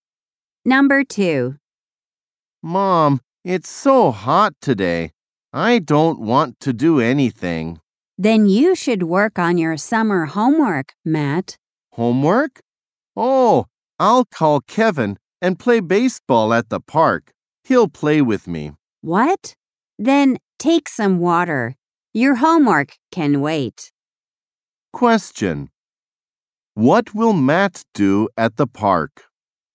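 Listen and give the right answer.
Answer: Play baseball with Kevin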